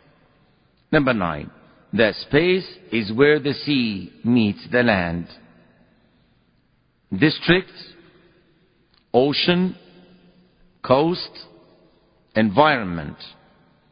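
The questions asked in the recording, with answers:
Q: The space is where the sea meets the land.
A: C: coast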